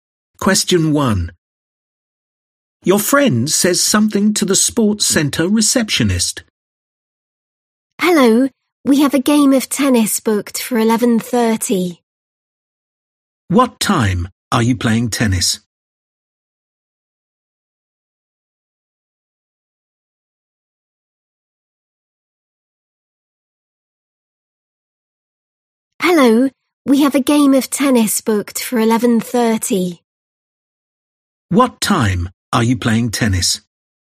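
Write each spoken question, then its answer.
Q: What time are you playing tennis?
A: 11:30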